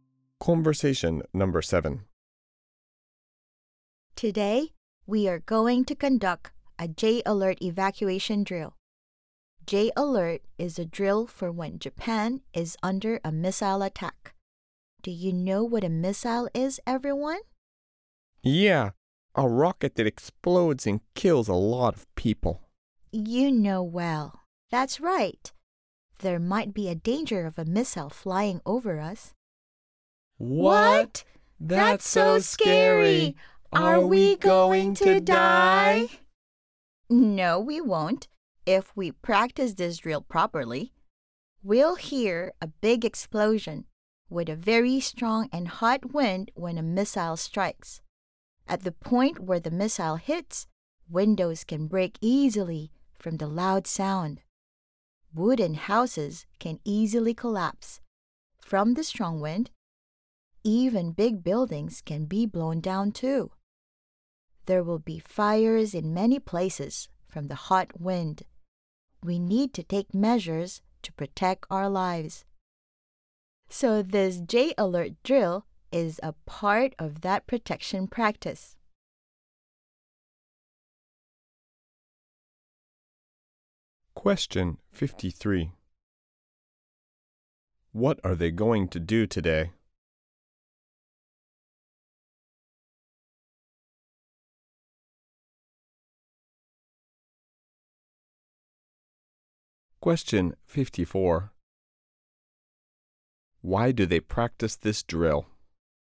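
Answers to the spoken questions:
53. Conduct a J-Alert evacuation drill
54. To protect their lives in case of a missile attack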